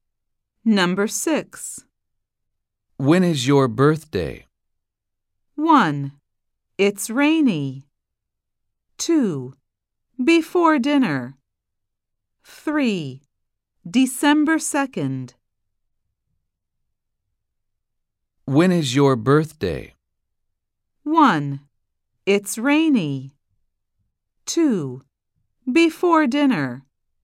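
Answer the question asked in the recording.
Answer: 3: December 2nd.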